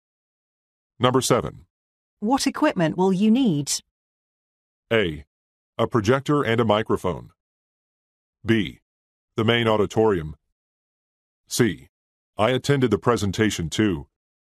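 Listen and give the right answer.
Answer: A: A projector and a microphone.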